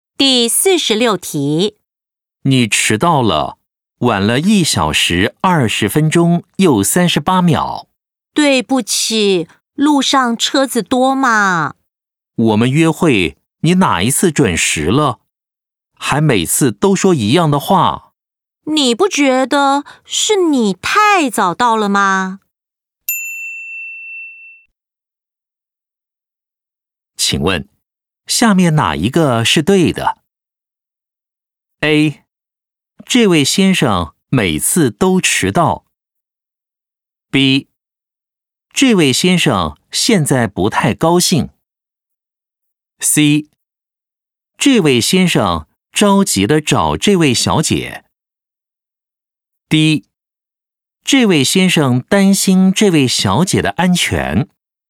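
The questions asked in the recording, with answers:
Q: 请问,下面哪一个是对的?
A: B: 这位先生现在不太高兴。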